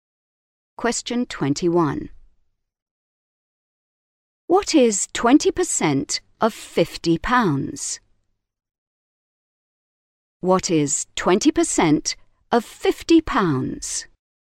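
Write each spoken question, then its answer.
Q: What is 20% of 50 pounds?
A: 10 pounds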